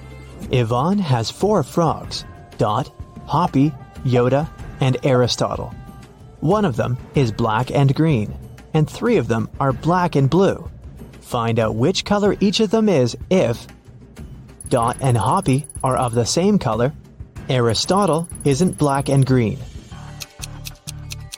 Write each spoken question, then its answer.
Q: Find out which color each of them is if Dot and Hoppy are of the same color, Aristotle isn't black and green.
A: So Yoda is black and green.